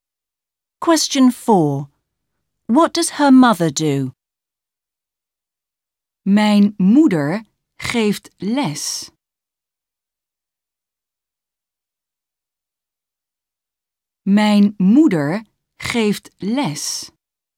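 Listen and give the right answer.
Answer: She is a teacher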